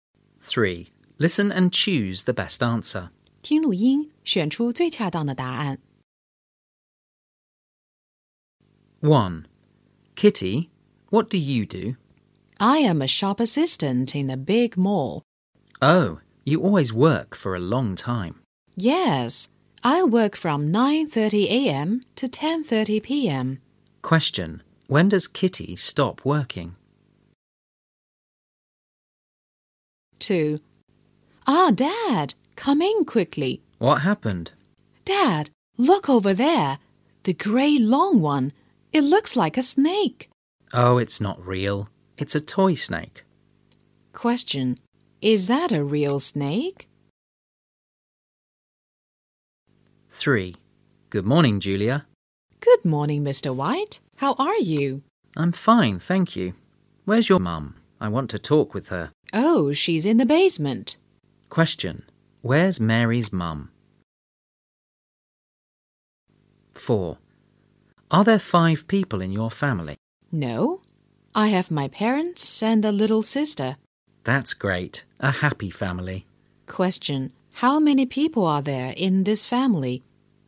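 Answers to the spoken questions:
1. At 10:30 p.m.
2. No, it's a toy snake.
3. In the basement.
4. Four.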